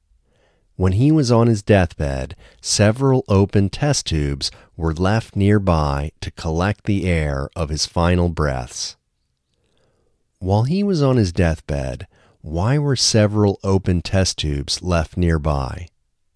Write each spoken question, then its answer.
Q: While he was on his deathbed, why were several open test tubes left nearby?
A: When he was on his deathbed, several open test tubes were left nearby to collect the air of his final breaths.